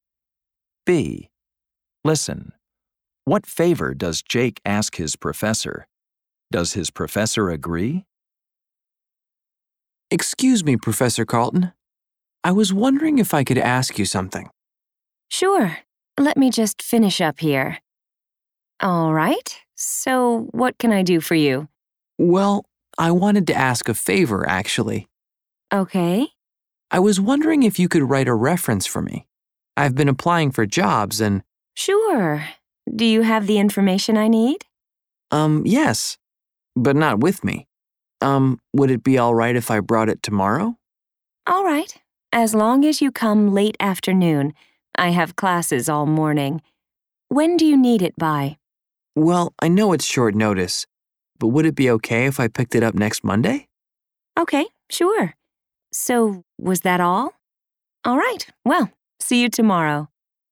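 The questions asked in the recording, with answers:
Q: What favor does Jake ask his professor?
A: To write a reference for him

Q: Does his professor agree?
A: Yes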